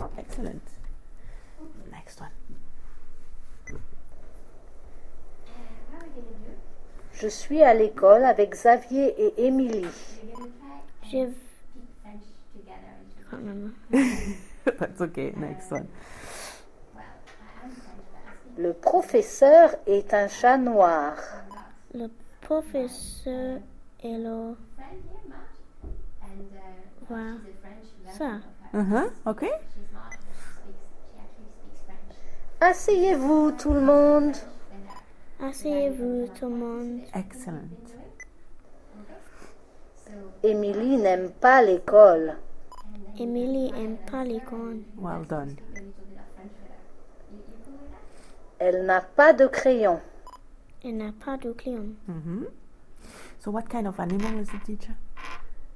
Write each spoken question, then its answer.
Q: So what kind of animal is the teacher?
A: Cat.